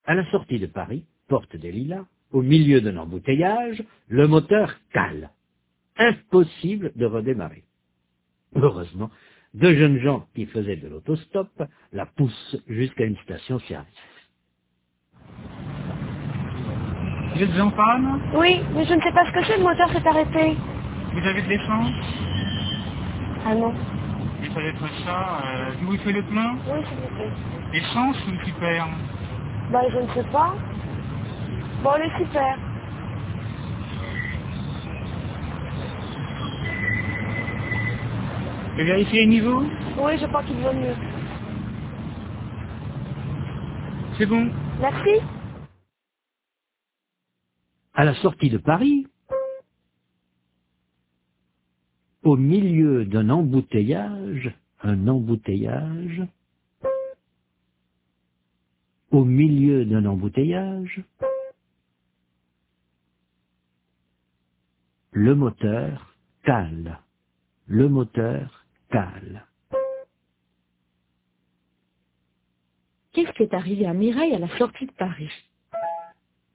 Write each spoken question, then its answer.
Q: Qu'est-ce qui est arrivé à Mireille à la sortie de Paris ?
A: Le moteur a calé.